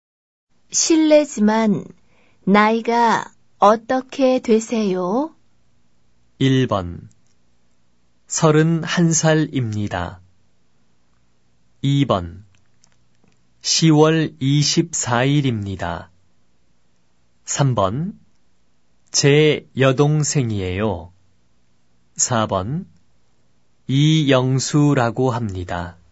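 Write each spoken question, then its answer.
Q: 실례지만 나이가 어떻게 되세요?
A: 1: 31살입니다.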